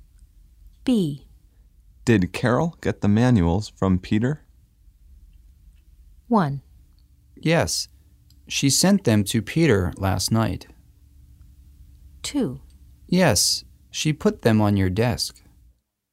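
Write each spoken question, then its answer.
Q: Did Carol get the manuals from Peter?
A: 2: Yes, she put them on your desk.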